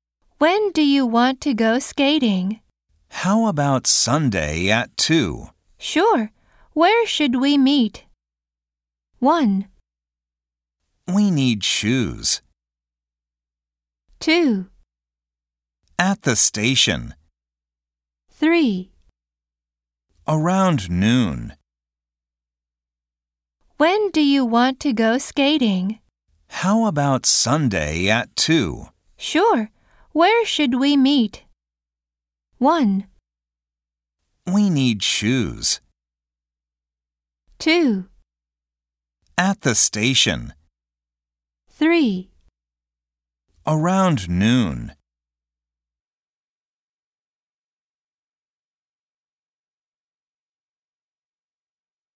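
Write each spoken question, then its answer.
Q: Sure. Where should we meet?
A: 2: At the station.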